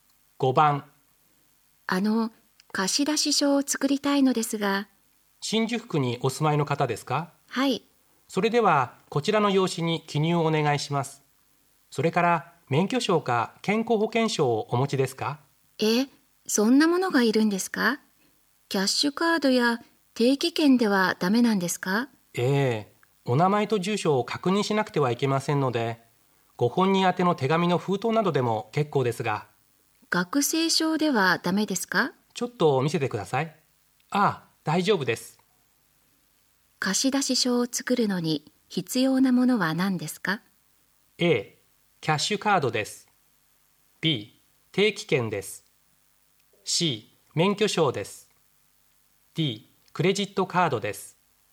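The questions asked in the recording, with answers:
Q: 貸出証を作るのに必要なものは何ですか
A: C: 免許証です。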